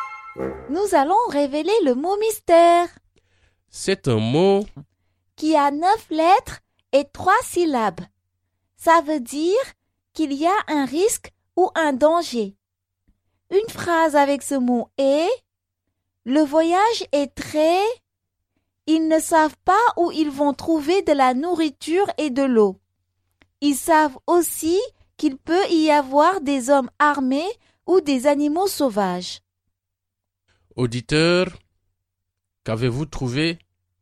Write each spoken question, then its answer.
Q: Auditeur, qu'avez-vous trouvé?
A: Le mot mystère est dangereux.